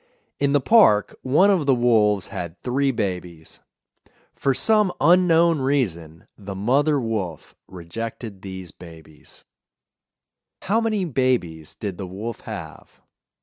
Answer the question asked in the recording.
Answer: The wolf had three babies.